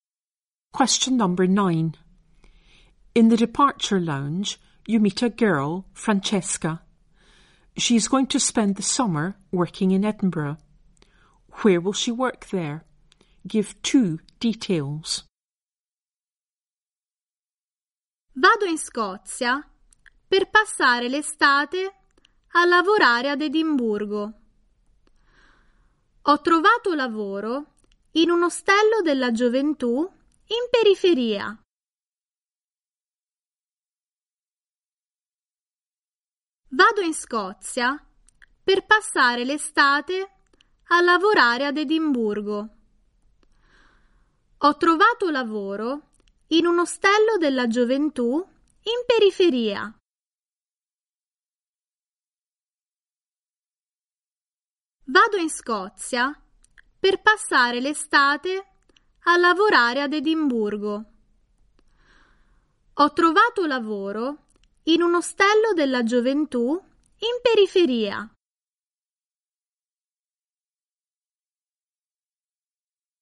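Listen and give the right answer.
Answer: In a youth hostel on the outskirts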